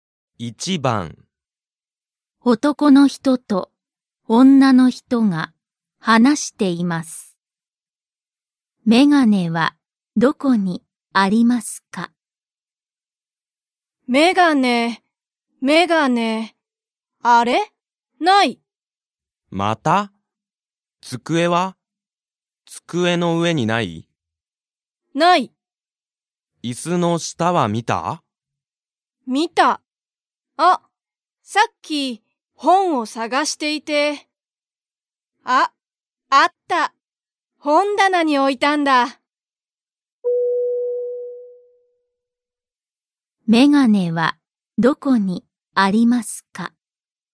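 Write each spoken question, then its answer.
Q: メガネはどこにありますか?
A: 本棚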